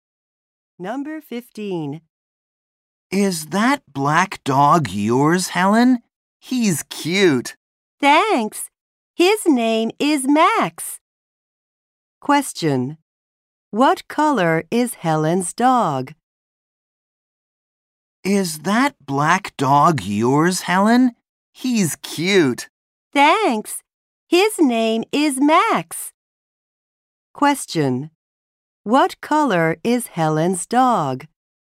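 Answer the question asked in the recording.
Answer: Black.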